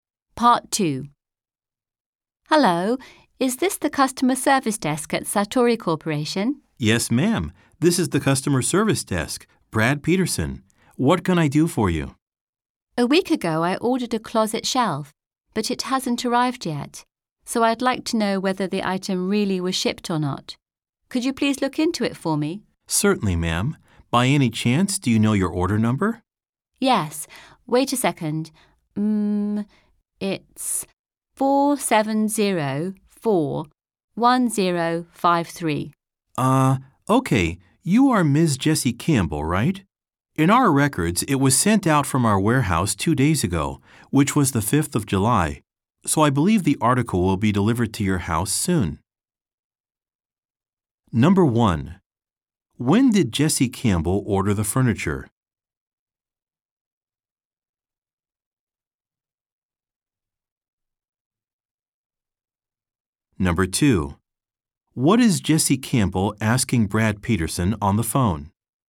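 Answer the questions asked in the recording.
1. A week ago
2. Whether the closet shelf she ordered was really shipped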